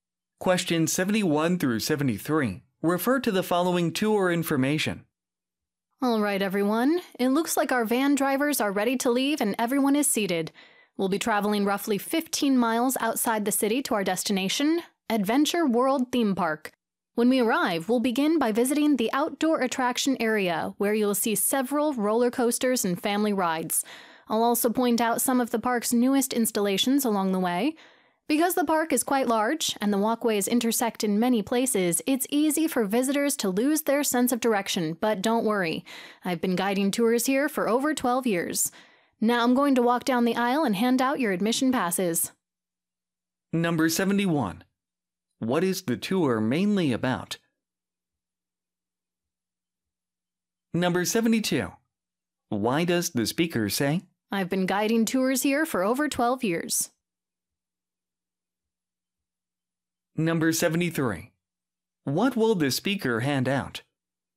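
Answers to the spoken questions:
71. A visit to Adventure World Theme Park
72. To reassure listeners that they will not get lost
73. Admission passes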